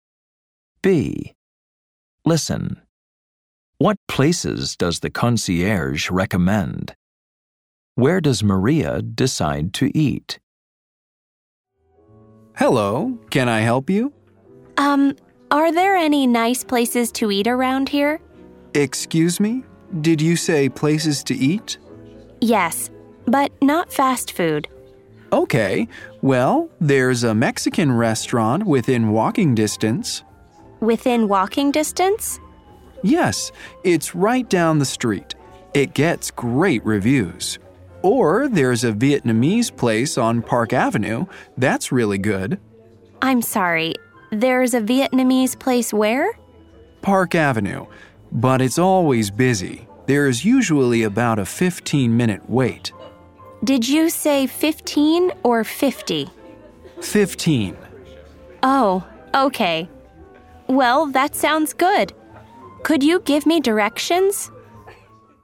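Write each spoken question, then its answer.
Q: What places does the concierge recommend?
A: A Mexican restaurant within walking distance and a Vietnamese place on Park Avenue

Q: Where does Maria decide to eat?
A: The Vietnamese place on Park Avenue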